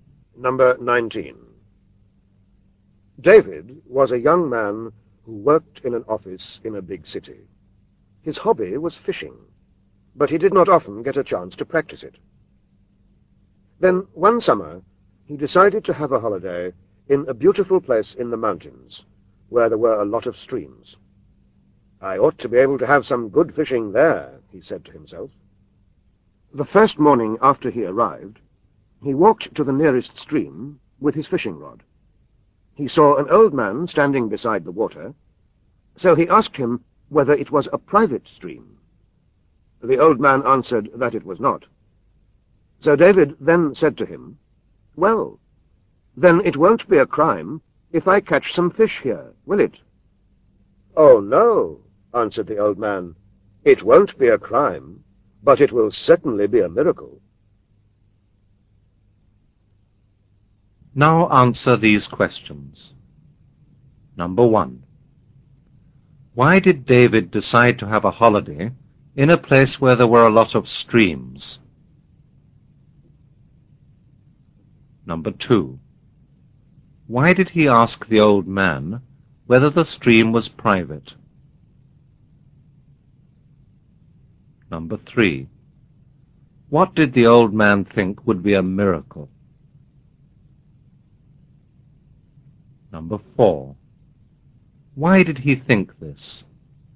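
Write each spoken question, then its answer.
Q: Why did David decide to have a holiday in a place where there were a lot of streams?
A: Because his hobby was fishing and he wanted some good fishing

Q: Why did he ask the old man whether the stream was private?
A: Because he wanted to know whether he was allowed to fish there

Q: What did the old man think would be a miracle?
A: David catching some fish there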